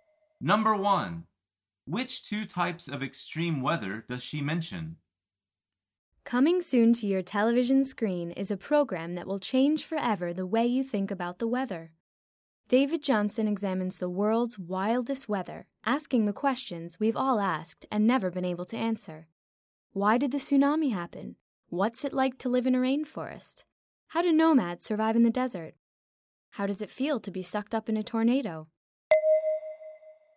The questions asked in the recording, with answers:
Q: Which two types of extreme weather does she mention?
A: The answer is a tsunami and a tornado.